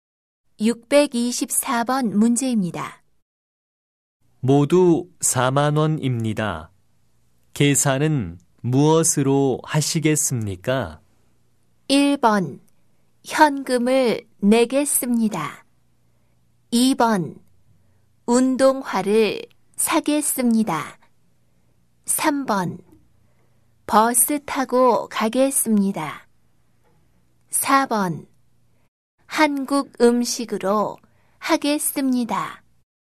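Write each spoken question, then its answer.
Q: 모두 4만 원입니다. 계산은 무엇으로 하시겠습니까?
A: 1: 현금을 내겠습니다.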